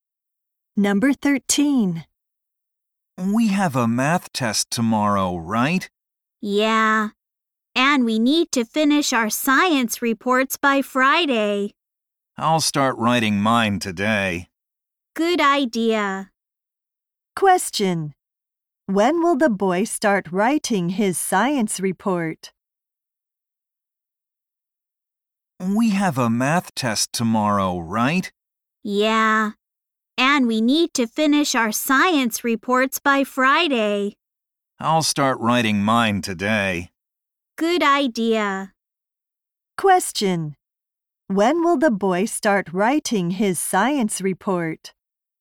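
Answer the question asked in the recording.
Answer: Today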